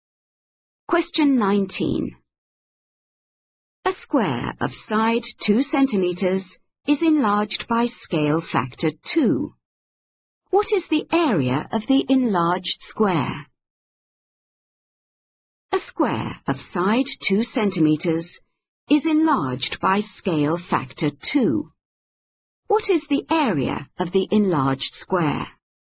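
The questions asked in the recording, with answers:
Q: What is the area of the enlarged square?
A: 16 square centimeters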